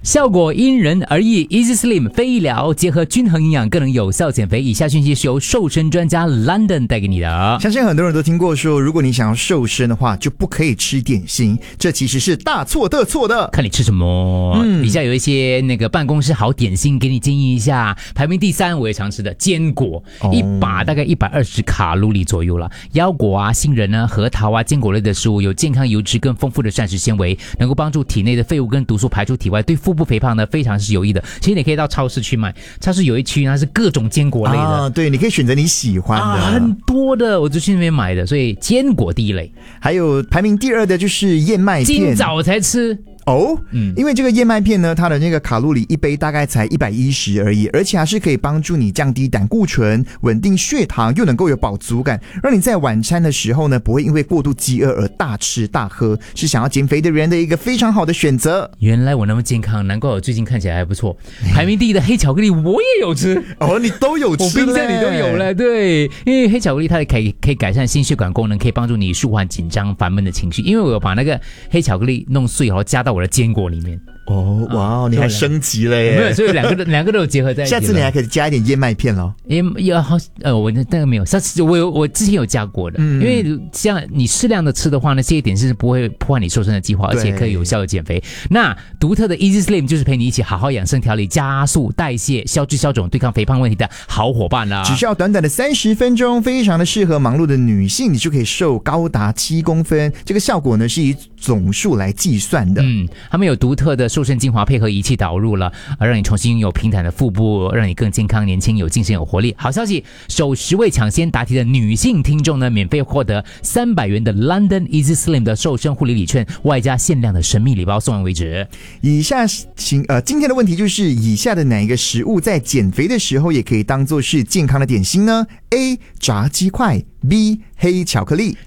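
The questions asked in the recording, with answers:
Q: 以下的哪一个食物在减肥的时候也可以当作是健康的点心呢 ?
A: B: 黑巧克力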